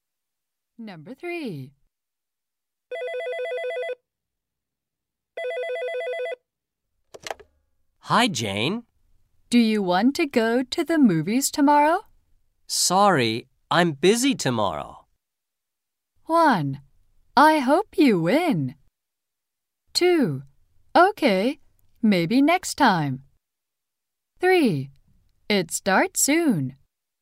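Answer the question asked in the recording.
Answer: 2: Okay, maybe next time.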